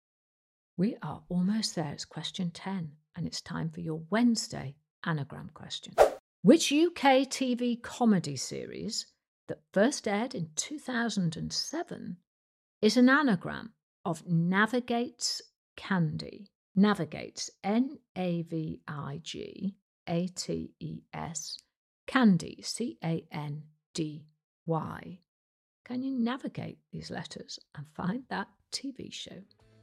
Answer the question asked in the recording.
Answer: It was the brilliant Gavin and Stacey.